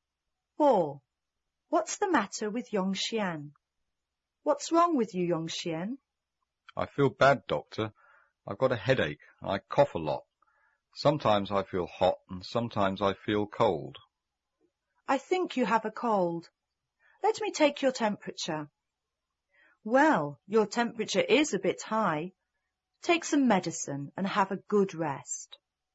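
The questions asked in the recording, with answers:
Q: What's the matter with Yong Xian?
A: He has a cold.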